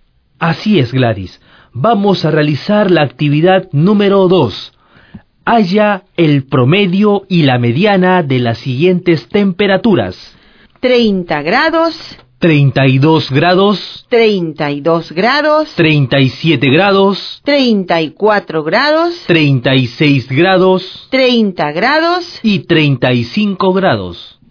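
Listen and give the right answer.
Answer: Promedio: 33 grados (266 ÷ 8 = 33,25); mediana: 33 grados ((32 + 34) ÷ 2)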